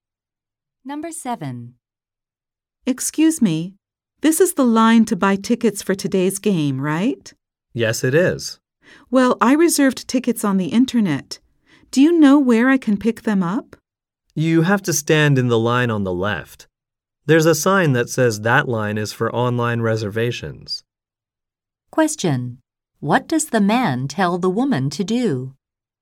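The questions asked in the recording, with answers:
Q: What does the man tell the woman to do?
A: Stand in the line on the left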